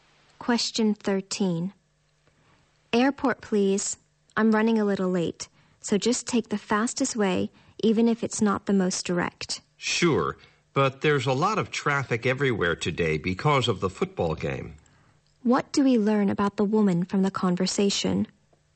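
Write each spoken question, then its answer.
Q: What do we learn about the woman from the conversation?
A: She is in a hurry to get to the airport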